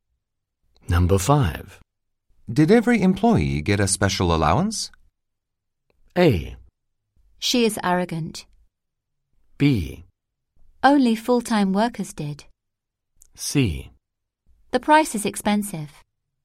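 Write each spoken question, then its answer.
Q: Did every employee get a special allowance?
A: B: Only full-time workers did.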